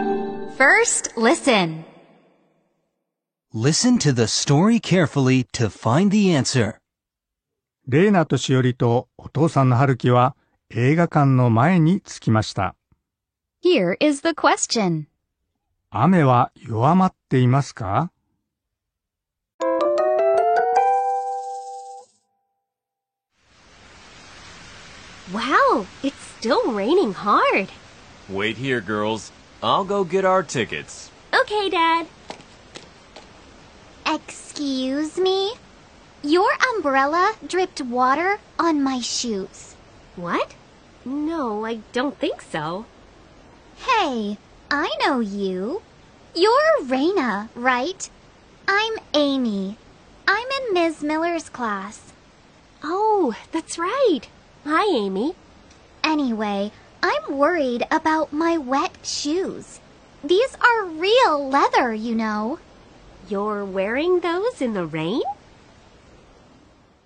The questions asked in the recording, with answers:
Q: 雨は弱まっていますか?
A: 答えは、そうではありませんね。